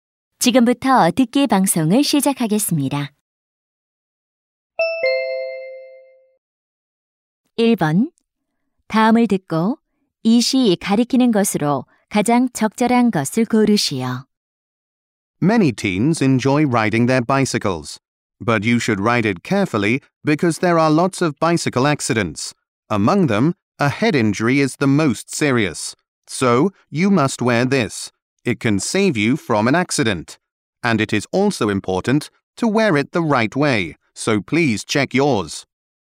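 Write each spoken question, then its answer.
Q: 다음을 듣고 이 시 가리키는 것으로 가장 적절한 것을 고르시오.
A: 헬멧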